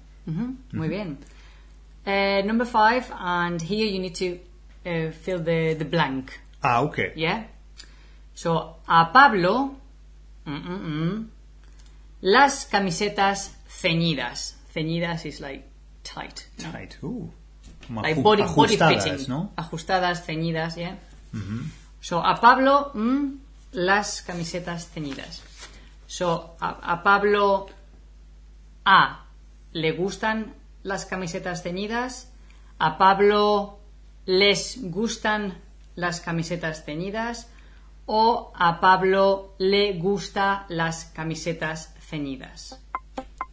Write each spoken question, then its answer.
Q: So, a Pablo, las camisetas ceñidas.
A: Correcto, la A. A Pablo le gustan.